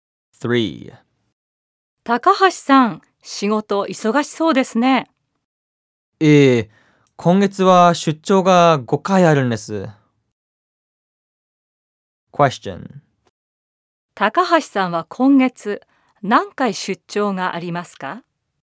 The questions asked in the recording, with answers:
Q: 高橋さんは今月何回出張がありますか?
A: 高橋さんは今月5回も出張があります。